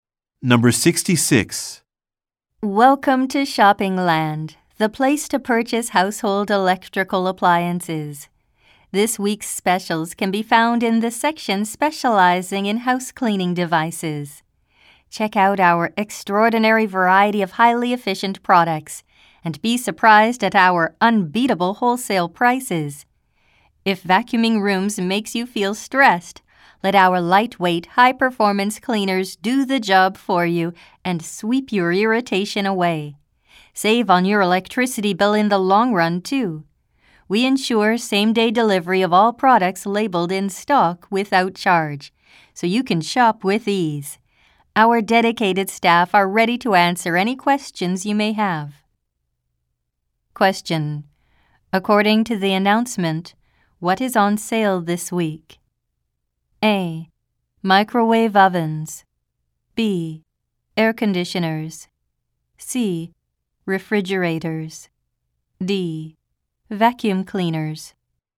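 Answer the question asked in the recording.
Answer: D: Vacuum cleaners.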